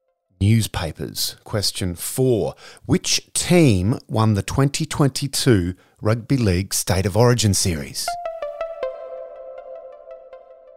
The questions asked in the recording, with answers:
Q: Which team won the 2022 Rugby League State of Origin Series?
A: It was Queensland.